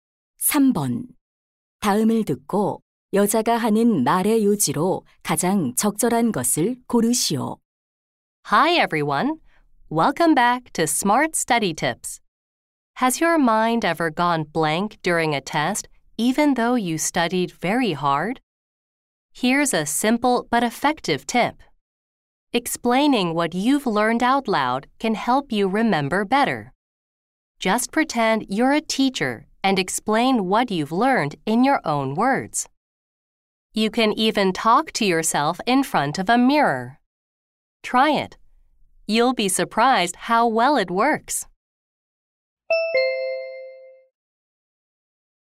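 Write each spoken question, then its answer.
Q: 다음을 듣고 여자가 하는 말의 요지로 가장 적절한 것을 고르시오.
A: 배운 내용을 소리 내어 설명하면 기억에 도움이 된다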